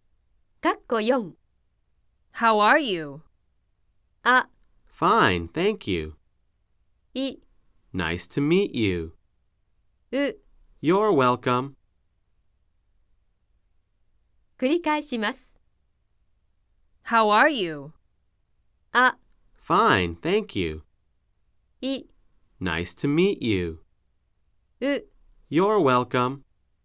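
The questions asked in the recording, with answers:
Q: How are you?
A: あ: Fine, thank you.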